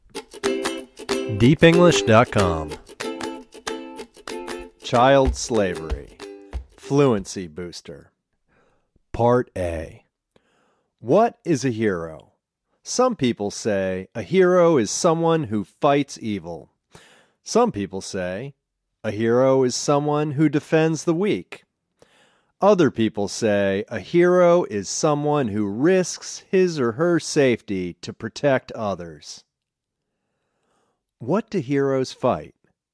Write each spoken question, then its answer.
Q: What do heroes fight?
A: Heroes fight evil.